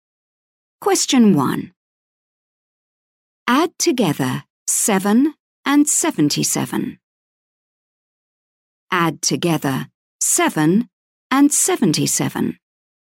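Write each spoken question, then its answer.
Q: Add together 7 and 77.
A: 84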